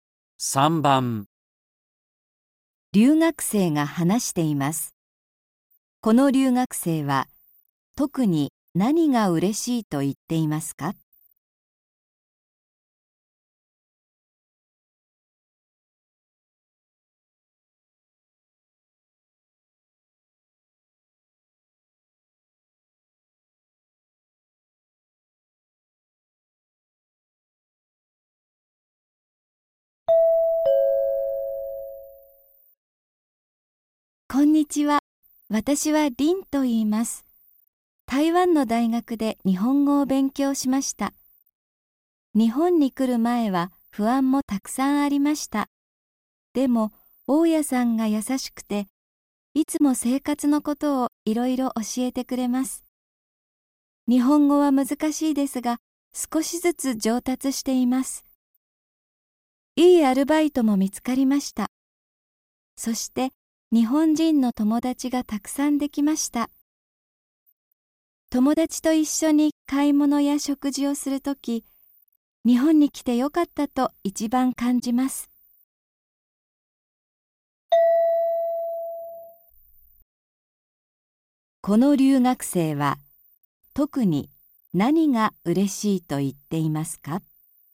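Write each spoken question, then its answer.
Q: この留学生は、特に何が嬉しいと言っていますか?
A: 日本人の友達がたくさんできたこと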